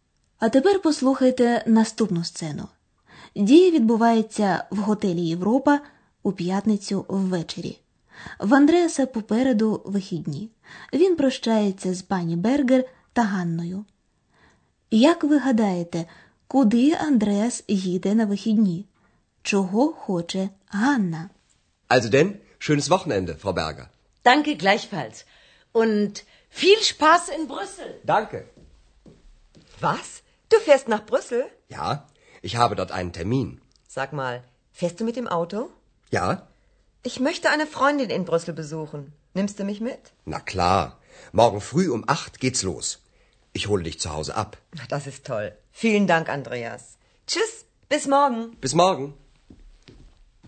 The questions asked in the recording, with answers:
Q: Як ви гадаєте, куди Андреас їде на вихідні?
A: Отже, у вихідні Андреас збирається поїхати машиною до Брюсселя.

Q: Чого хоче Ганна?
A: А Ганна хоче провідати свою подругу, яка там живе.